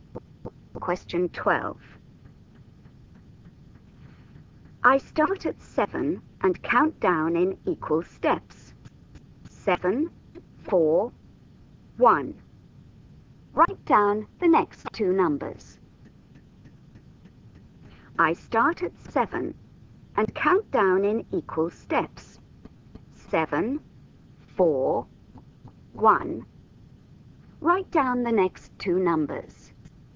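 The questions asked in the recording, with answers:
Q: 7, 4, 1. Write down the next two numbers.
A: -2, -5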